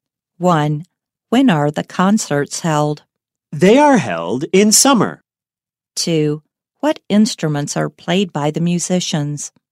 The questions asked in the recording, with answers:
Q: What instruments are played by the musicians?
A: Violins, cellos, flutes, trumpets, and some other instruments are played by the musicians.